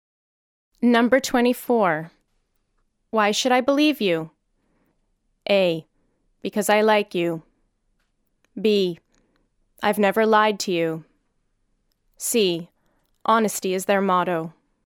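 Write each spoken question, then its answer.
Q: Why should I believe you?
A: B: I've never lied to you.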